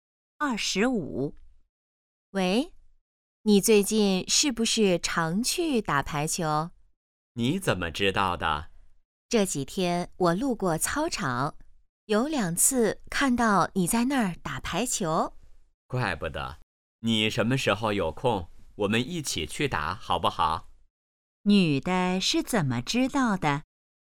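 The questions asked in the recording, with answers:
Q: 女的是怎么知道的?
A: 路过操场时看到他在打排球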